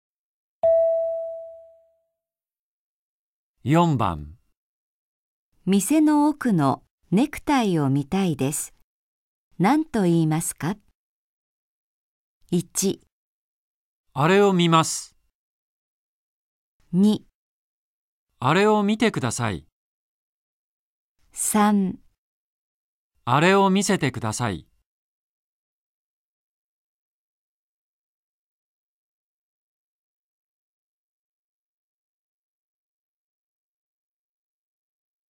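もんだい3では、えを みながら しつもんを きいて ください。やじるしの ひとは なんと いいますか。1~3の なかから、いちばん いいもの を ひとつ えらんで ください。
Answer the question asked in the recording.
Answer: あれを見せてください。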